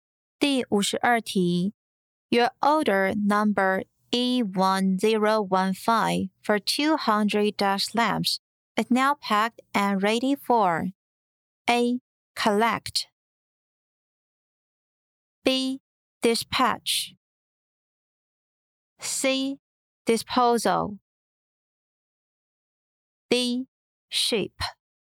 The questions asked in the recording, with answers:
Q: Your order number E1015 for 200 dash lamps is now packed and ready for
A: B. Dispatch